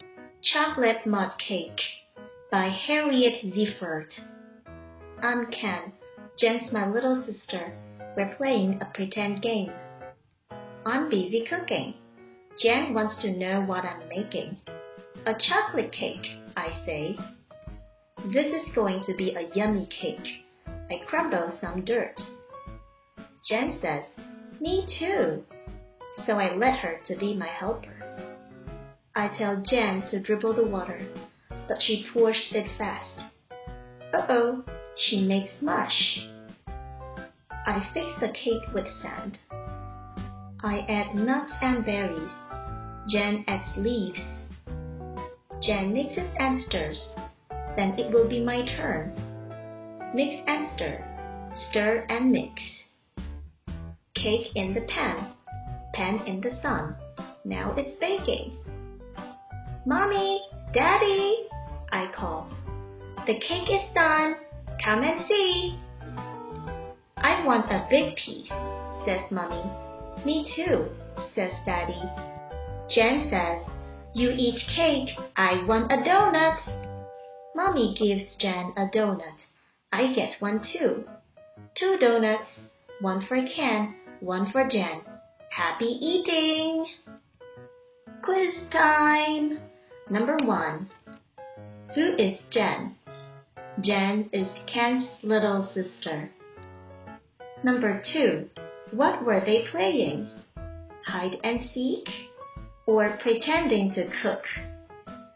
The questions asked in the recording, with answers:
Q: What were they playing? Hide and seek or pretending to cook?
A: The answer is pretending to cook.